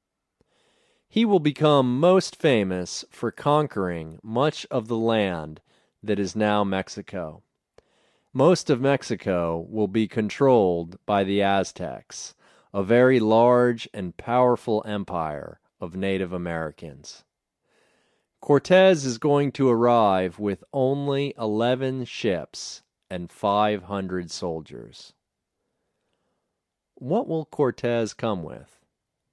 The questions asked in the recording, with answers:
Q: What will Cortez come with?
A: He will come with 11 ships and 500 soldiers.